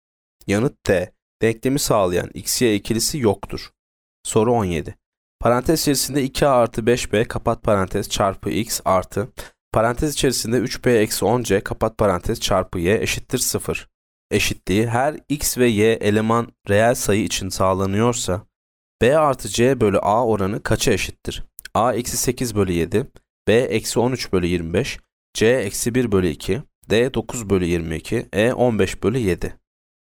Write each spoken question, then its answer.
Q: Eşitliği her x ve y eleman reel sayı için sağlanıyorsa b artı c bölü a oranı kaça eşittir?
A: Yanıt B. Eksi 13 bölü 25.